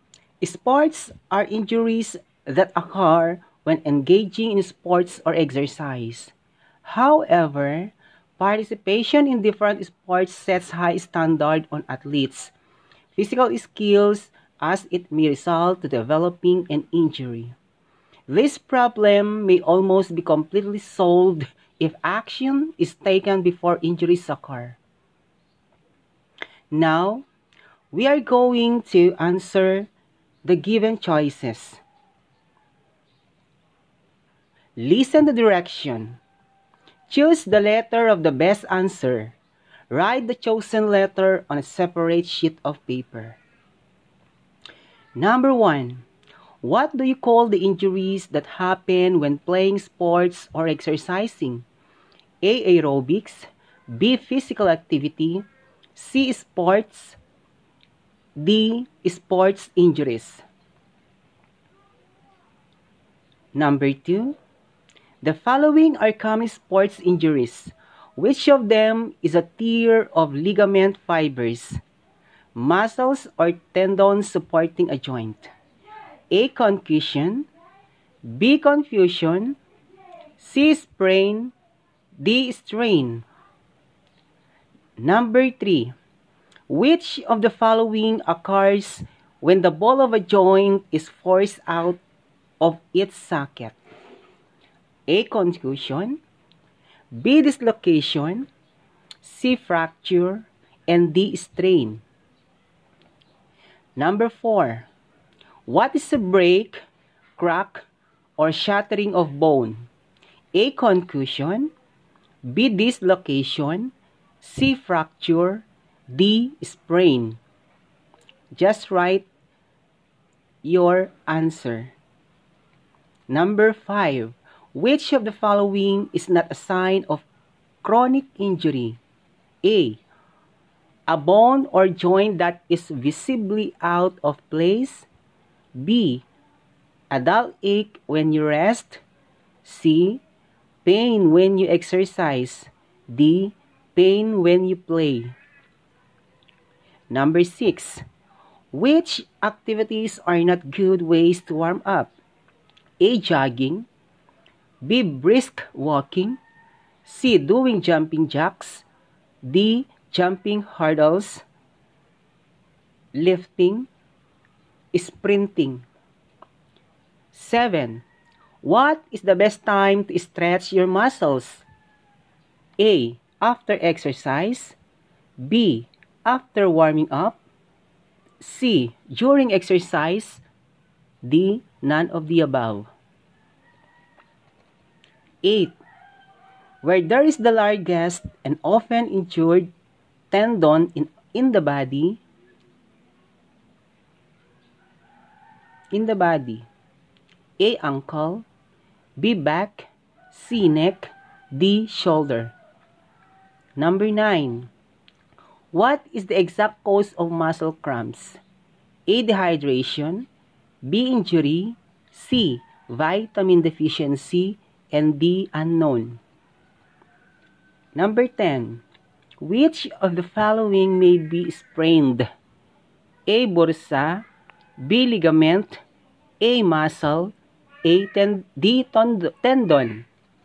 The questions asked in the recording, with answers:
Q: What do you call the injuries that happen when playing sports or exercising?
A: number 1 is letter D